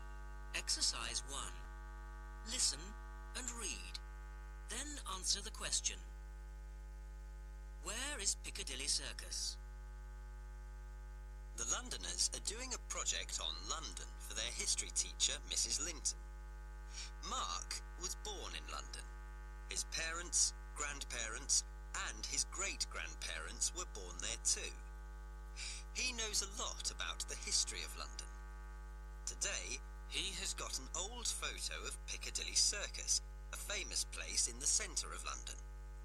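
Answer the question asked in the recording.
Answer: In the centre of London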